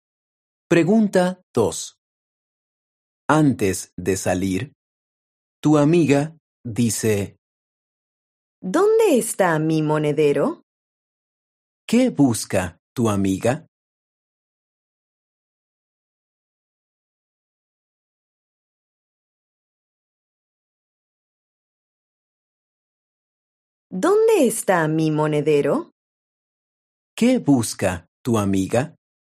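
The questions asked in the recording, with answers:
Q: ¿Qué busca tu amiga?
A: su monedero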